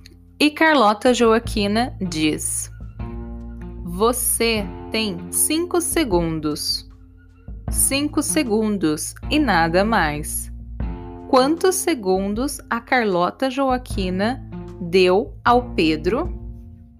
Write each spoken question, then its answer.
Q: Quantos segundos a Carlota Joaquina deu ao Pedro?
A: cinco segundos. Ela deu cinco segundos para que ele se explicasse.